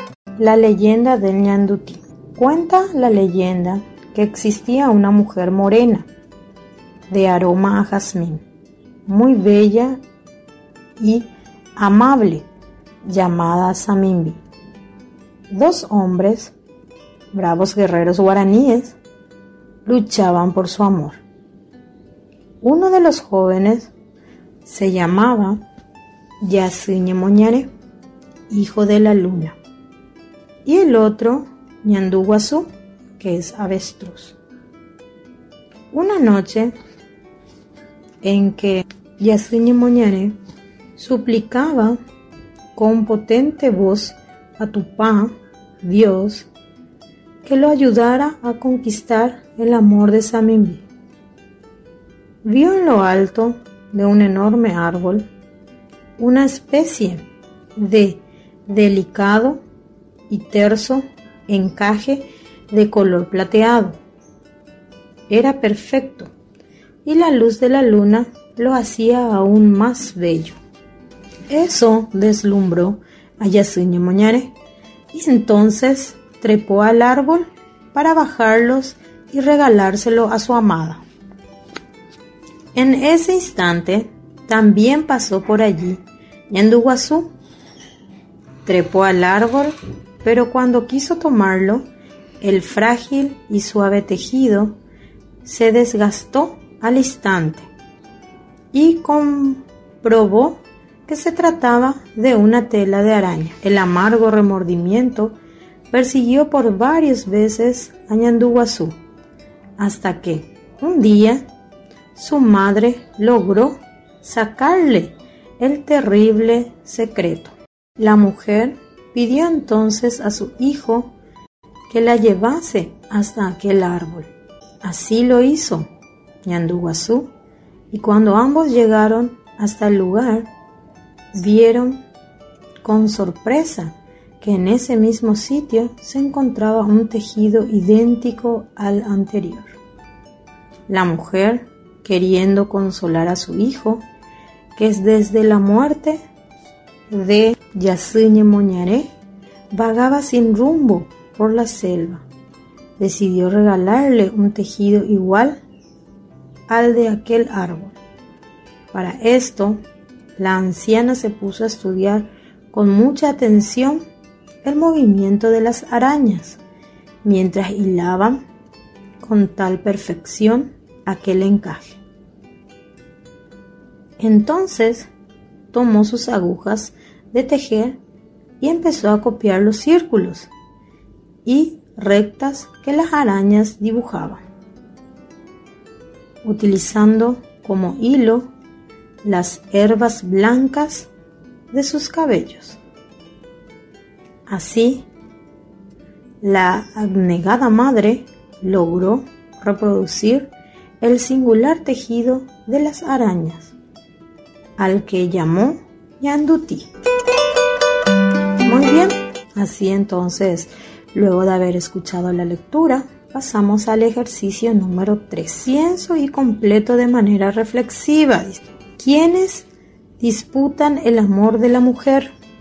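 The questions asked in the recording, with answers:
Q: ¿Quiénes disputan el amor de la mujer?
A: Yasiñe Moñaré y Ñanduguazú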